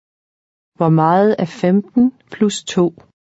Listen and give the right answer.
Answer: 17. 17.